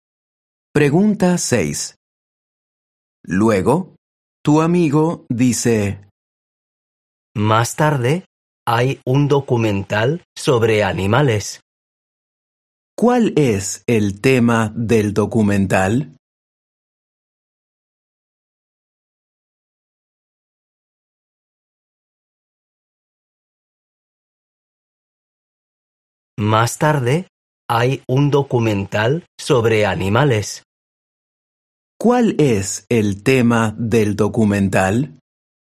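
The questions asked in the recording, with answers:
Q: ¿Cuál es el tema del documental?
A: Los animales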